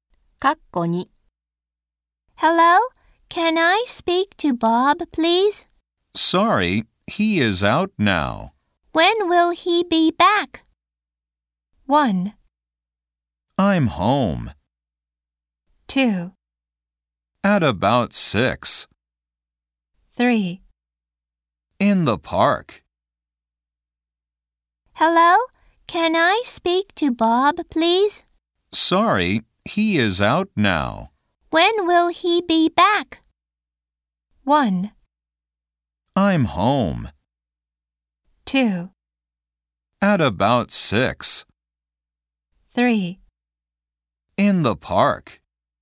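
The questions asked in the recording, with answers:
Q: When will he be back?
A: 2: At about 6.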